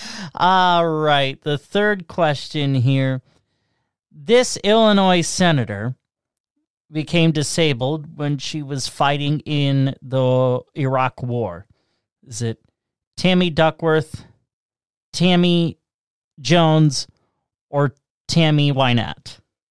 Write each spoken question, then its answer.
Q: This Illinois senator became disabled when she was fighting in the Iraq War. Is it Tammy Duckworth, Tammy Jones, or Tammy Wynette?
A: That is A, Tammy Duckworth.